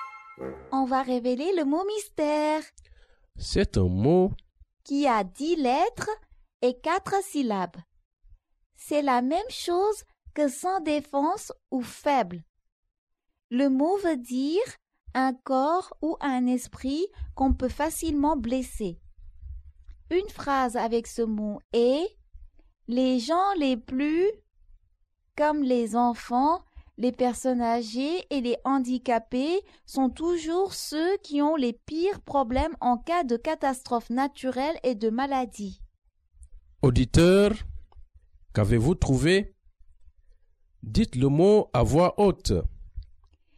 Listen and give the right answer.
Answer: Le mot mystère est « vulnérable ».